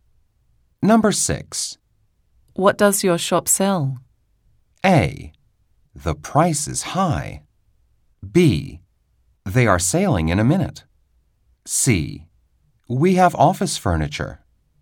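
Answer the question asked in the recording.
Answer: C: We have office furniture.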